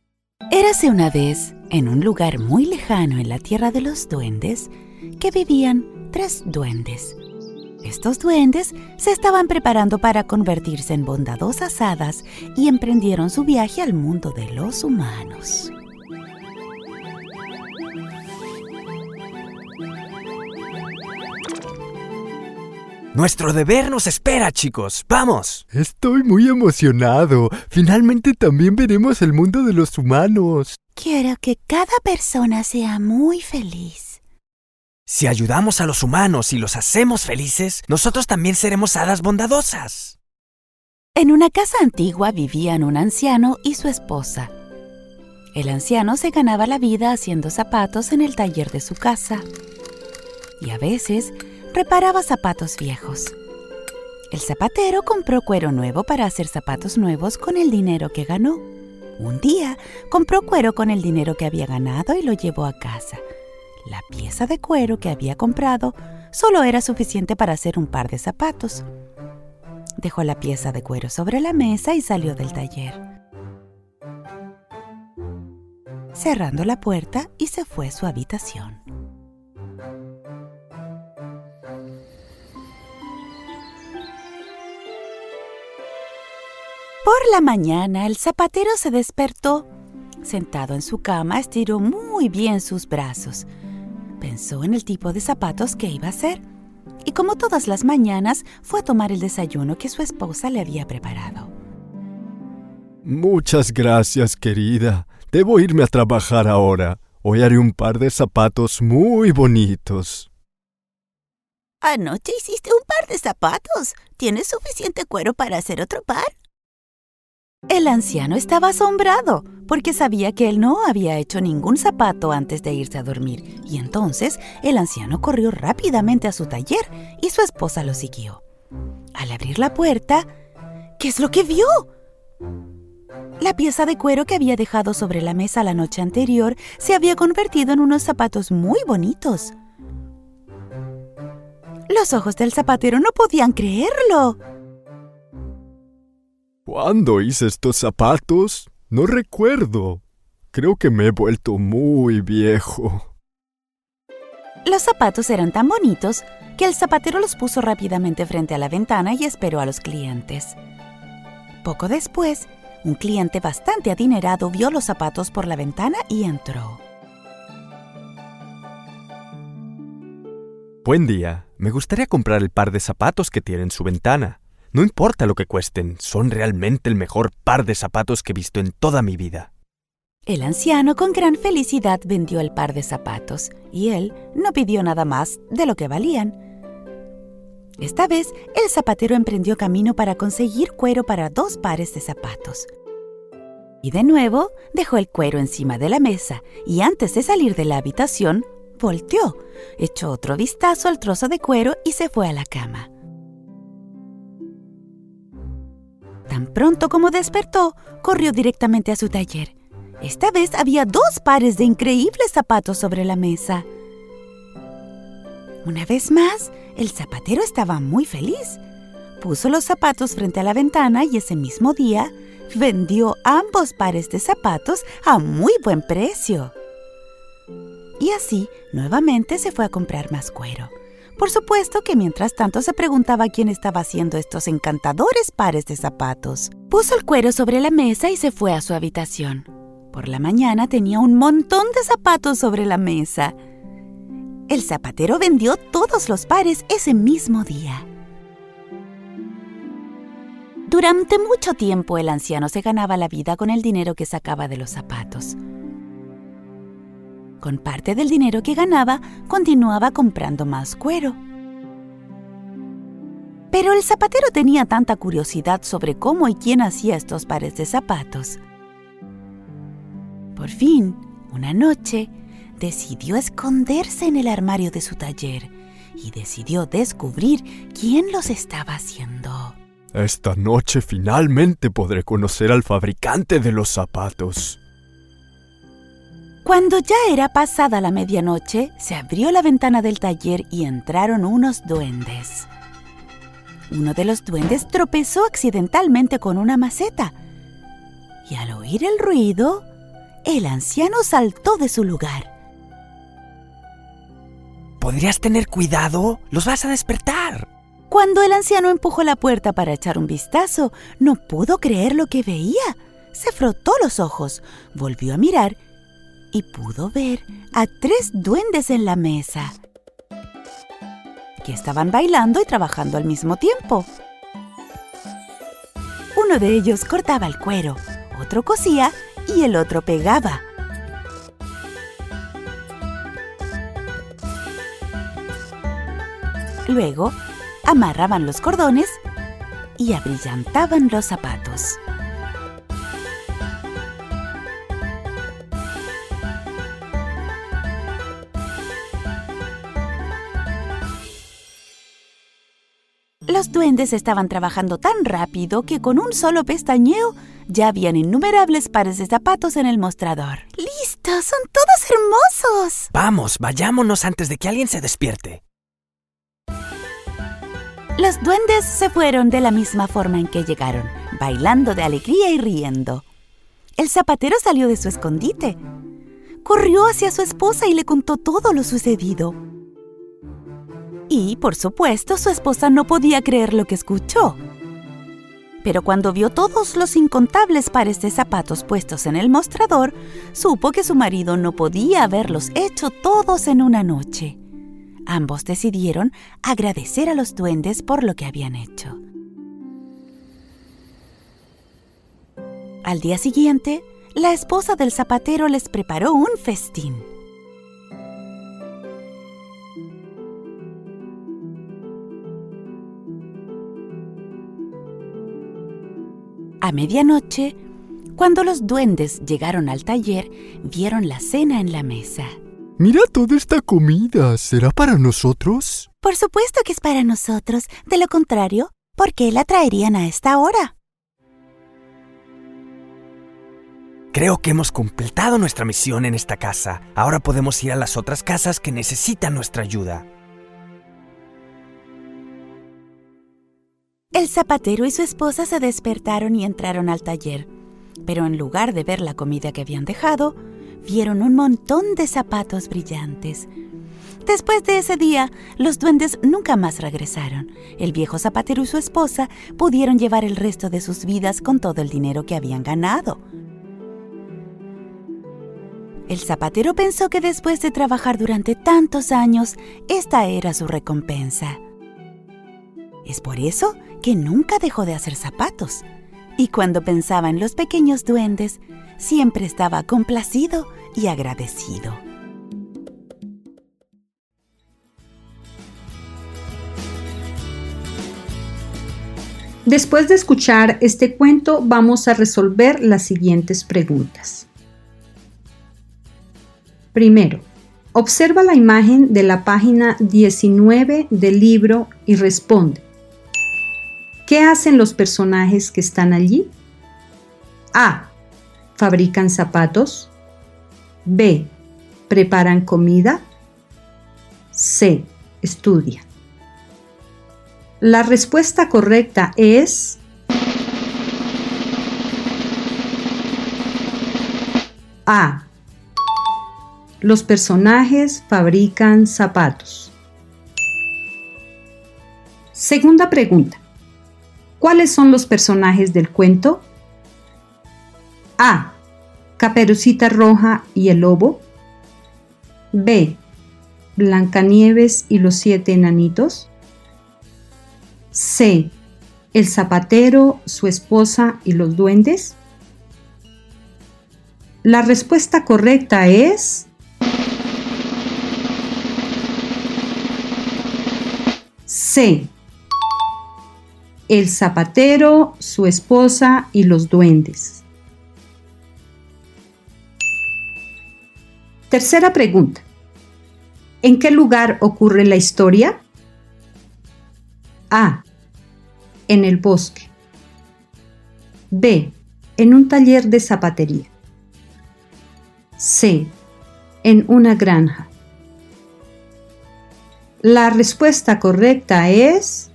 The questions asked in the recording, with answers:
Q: ¿En qué lugar ocurre la historia?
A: B. En un taller de zapatería.